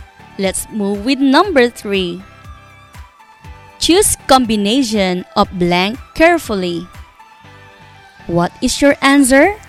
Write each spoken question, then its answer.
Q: Choose combination of blank carefully.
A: The answer is ingredients.